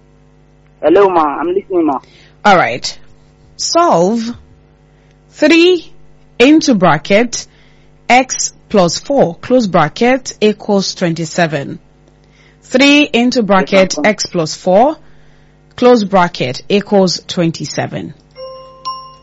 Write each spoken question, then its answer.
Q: Solve 3 into bracket x plus 4 close bracket equals 27.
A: Ma, the answer is 5, ma'am.